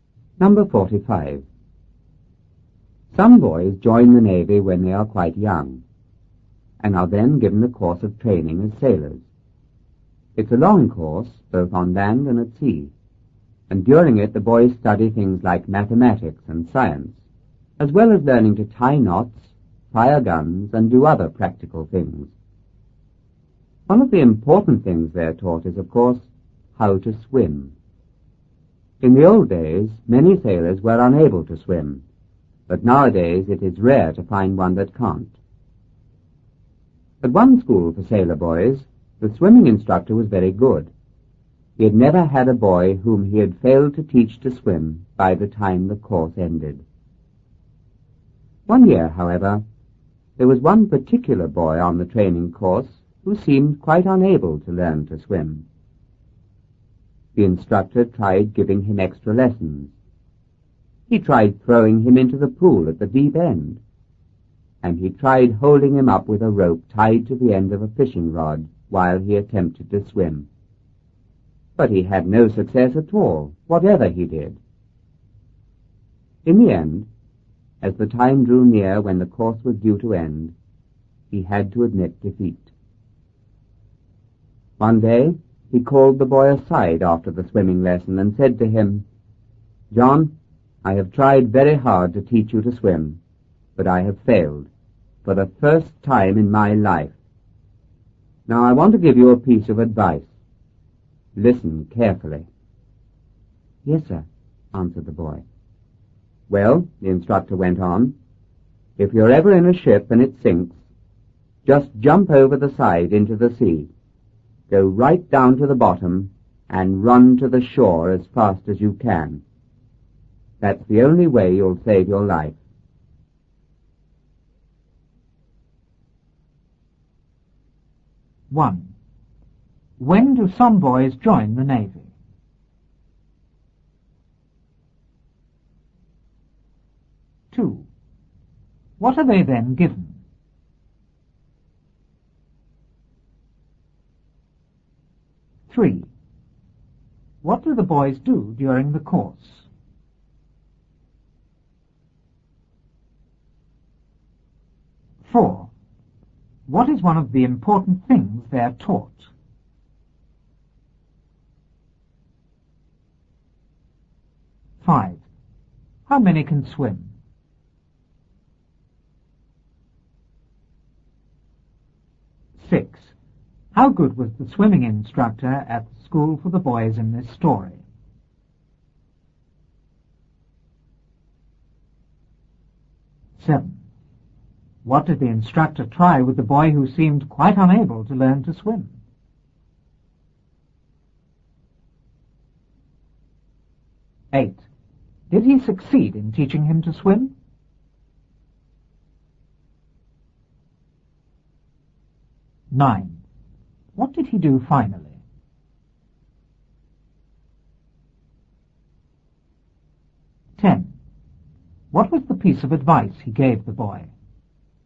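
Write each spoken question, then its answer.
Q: When do some boys join the Navy?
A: When they are quite young

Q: What are they then given?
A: A course of training as sailors

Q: What do the boys do during the course?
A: Study mathematics and science, and learn to tie knots, fire guns and do other practical things

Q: What is one of the important things they're taught?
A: How to swim

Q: How many can swim?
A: Nearly all; it is rare to find one who can't

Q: How good was the swimming instructor at the school for the boys in this story?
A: Very good; he had never failed to teach a boy to swim by the end of the course

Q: What did the instructor try with the boy who seemed quite unable to learn to swim?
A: Extra lessons, throwing him into the deep end, and holding him up with a rope tied to a fishing rod

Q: Did he succeed in teaching him to swim?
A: No

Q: What did he do finally?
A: He admitted defeat and gave the boy a piece of advice

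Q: What was the piece of advice he gave the boy?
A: If his ship sinks, jump into the sea, go down to the bottom and run to the shore as fast as he can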